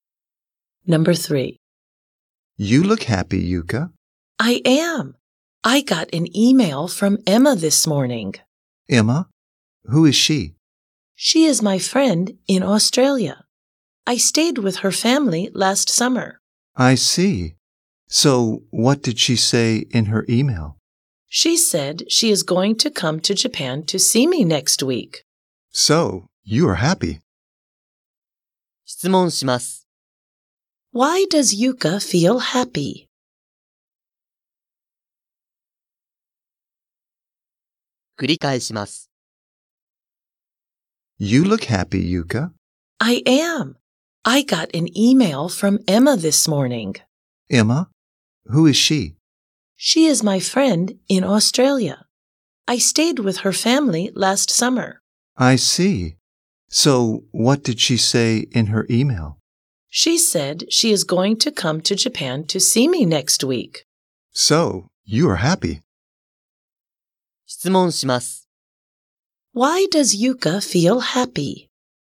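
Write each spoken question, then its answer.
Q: Why does Yuka feel happy?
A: Because Emma is going to come to Japan to see her next week.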